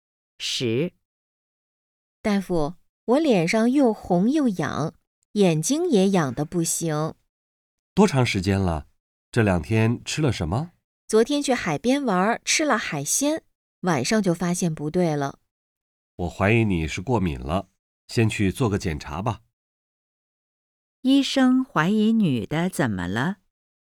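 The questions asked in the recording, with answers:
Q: 医生怀疑女的怎么了?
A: 过敏了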